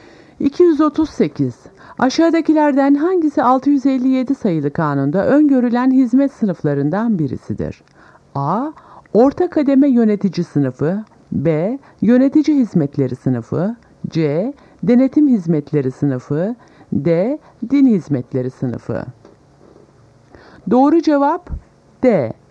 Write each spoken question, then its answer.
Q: Aşağıdakilerden hangisi 657 sayılı kanunda öngörülen hizmet sınıflarından birisidir?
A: Doğru cevap D. Din hizmetleri sınıfı.